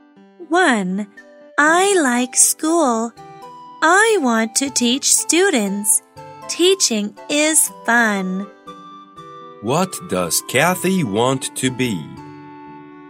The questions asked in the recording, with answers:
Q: What does Kathy want to be?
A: She wants to be a teacher.